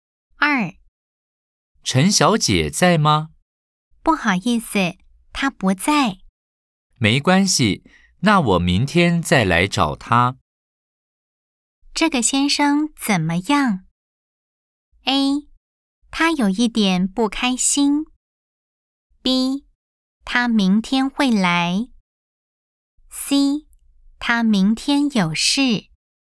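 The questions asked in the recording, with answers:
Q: 这个先生怎么样?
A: B: 他明天会来。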